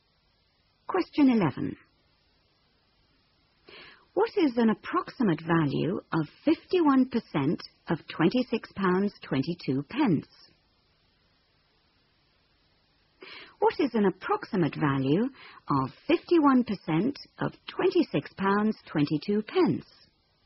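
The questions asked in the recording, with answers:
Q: What is an approximate value of 51% of £26.22?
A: About £13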